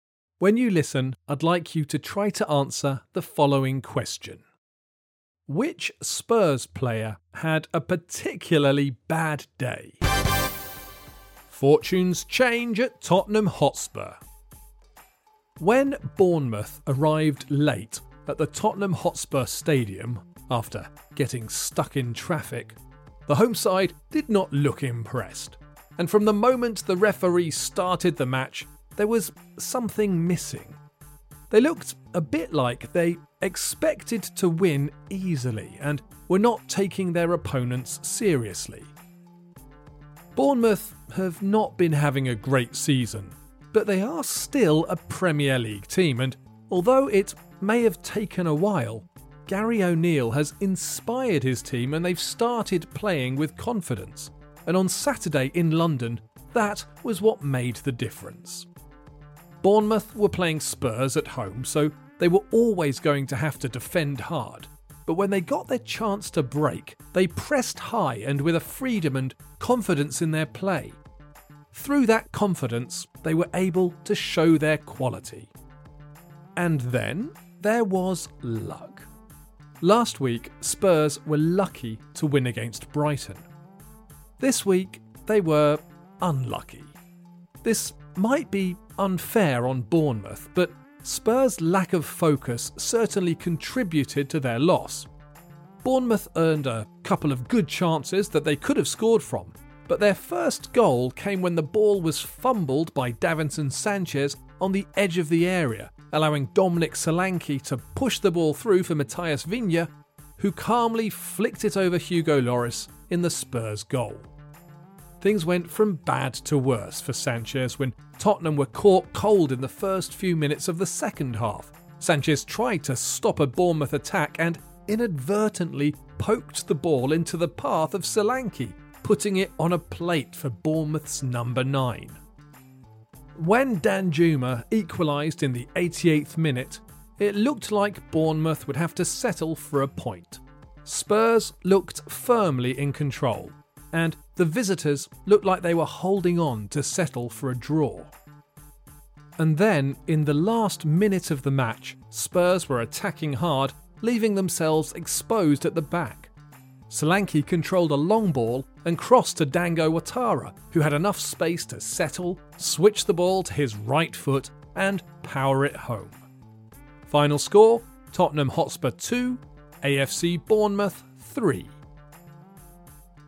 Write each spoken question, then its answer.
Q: Which Spurs player had a particularly bad day?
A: The answer is Davinson Sanchez.